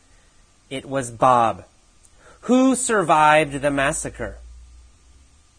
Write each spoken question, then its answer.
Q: Who survived the massacre?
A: Well, Bob survived the massacre.